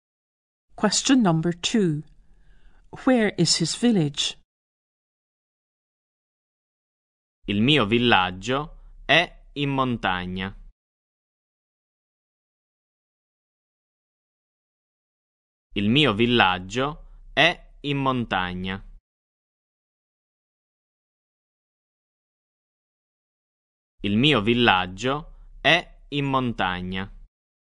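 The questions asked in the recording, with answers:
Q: Where is his village?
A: In the mountains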